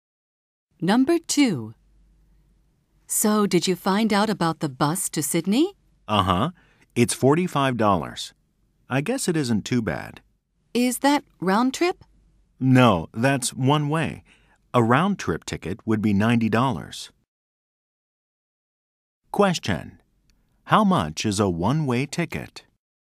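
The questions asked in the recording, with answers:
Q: How much is a one-way ticket?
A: $45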